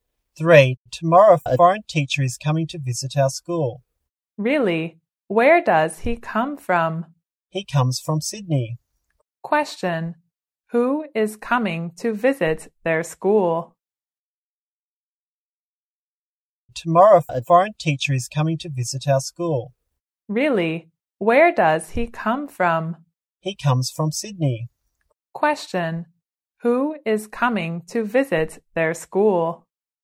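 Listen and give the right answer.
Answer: A foreign teacher (from Sydney).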